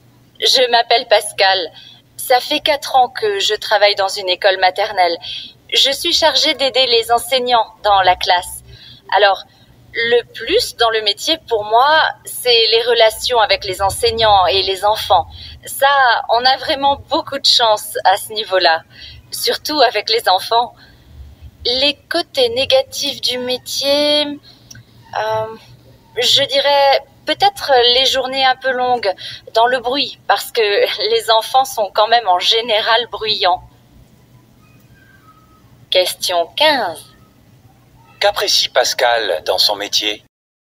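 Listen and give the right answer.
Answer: Les relations avec les enseignants et les enfants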